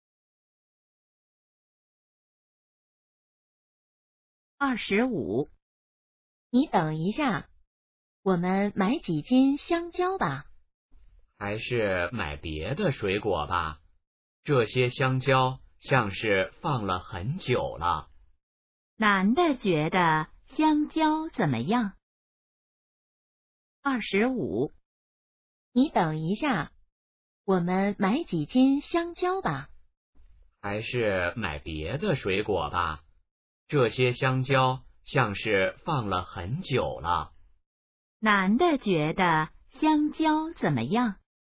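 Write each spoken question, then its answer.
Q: 男的觉得香蕉怎么样?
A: 放了很久了,不新鲜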